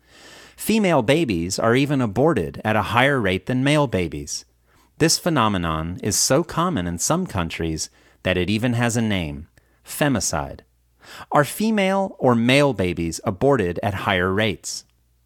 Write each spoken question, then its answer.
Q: Are female or male babies aborted at higher rates?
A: Female babies are aborted at higher rates than male babies.